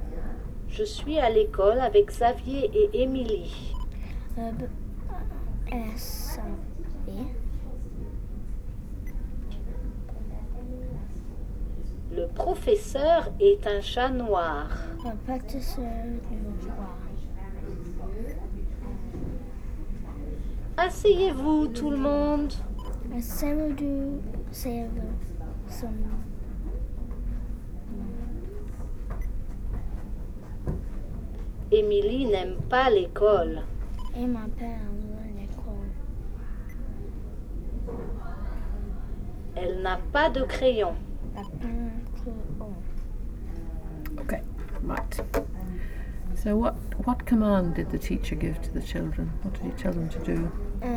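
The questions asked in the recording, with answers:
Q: So what command did the teacher give to the children?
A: Sit down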